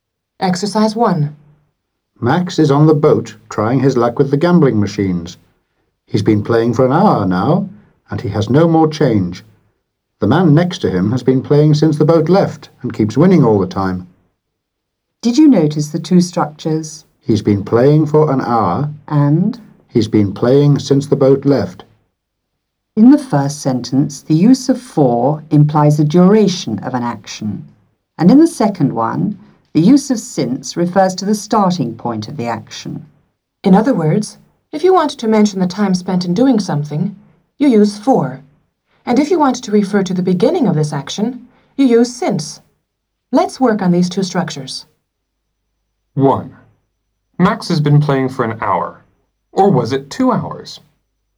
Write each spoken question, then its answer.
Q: Max has been playing for an hour. Or was it 2 hours?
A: No, Max has been playing for an hour.